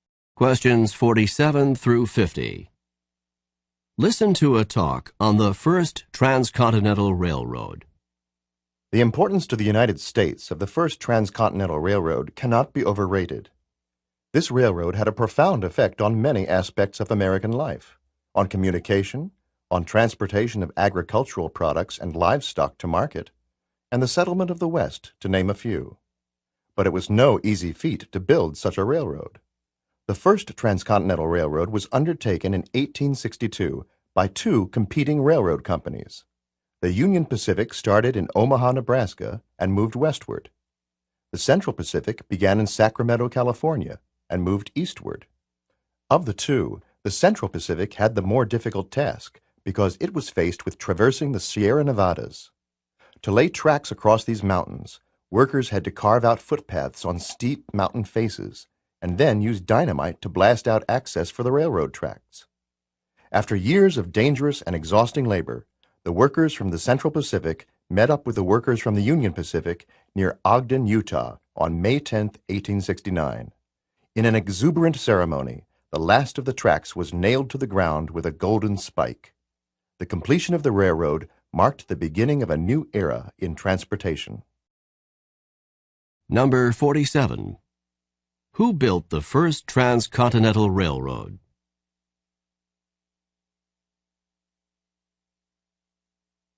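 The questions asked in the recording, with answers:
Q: Who built the First Transcontinental Railroad?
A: Two competing railroad companies, the Union Pacific and the Central Pacific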